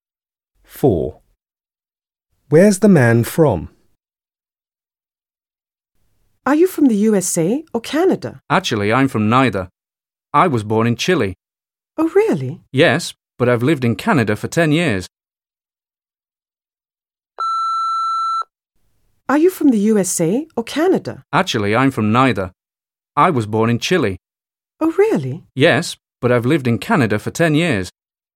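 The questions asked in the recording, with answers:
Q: Where's the man from?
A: Chile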